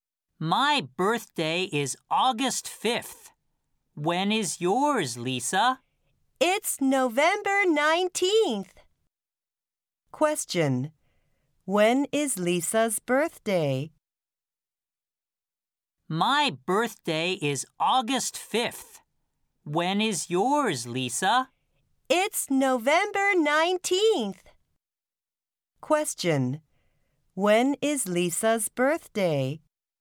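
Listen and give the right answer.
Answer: November 19th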